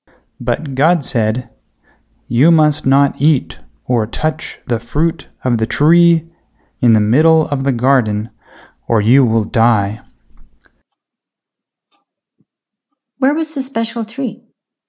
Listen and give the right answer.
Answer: The special tree was in the middle of the garden.